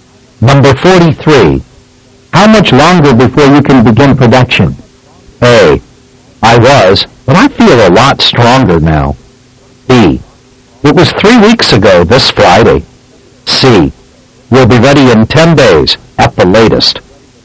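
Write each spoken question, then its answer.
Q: How much longer before you can begin production?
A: C: We'll be ready in 10 days at the latest.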